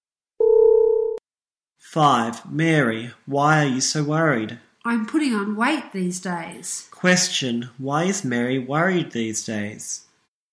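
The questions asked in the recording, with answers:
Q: Question, why is Mary worried these days?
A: She is putting on weight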